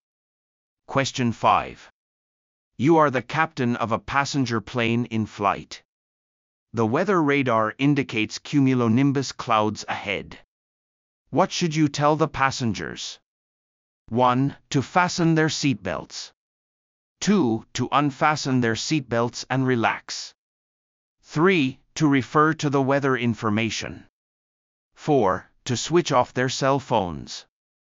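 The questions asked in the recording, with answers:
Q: What should you tell the passengers?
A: 1: To fasten their seatbelts.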